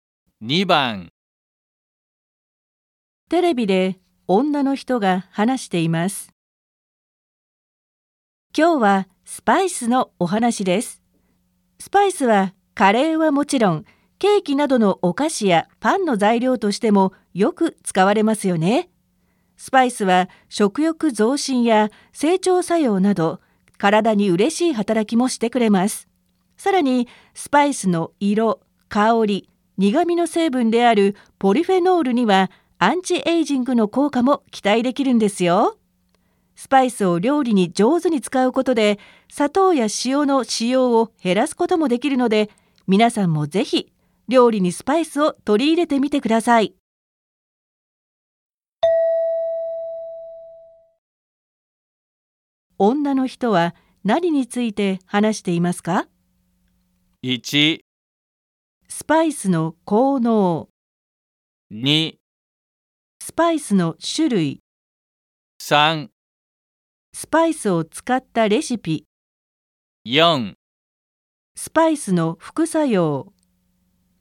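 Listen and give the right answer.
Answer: 1: スパイスの効能。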